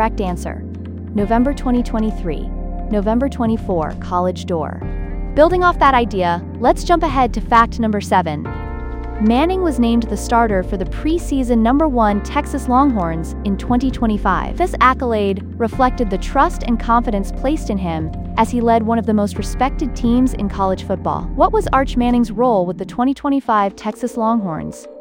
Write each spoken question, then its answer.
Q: What was Arch Manning's role with the 2025 Texas Longhorns?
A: Correct answer, starting quarterback